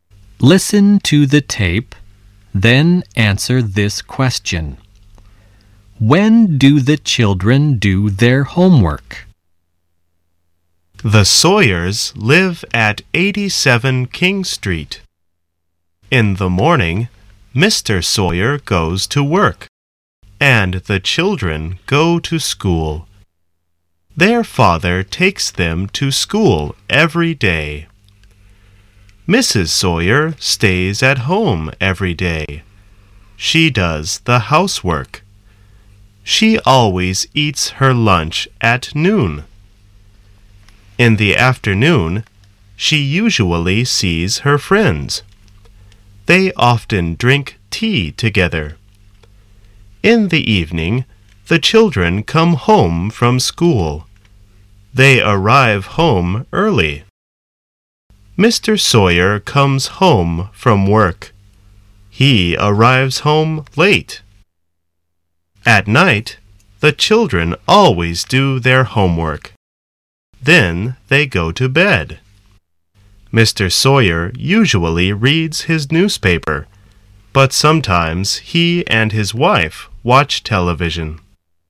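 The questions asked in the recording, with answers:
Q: When do the children do their homework?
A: At night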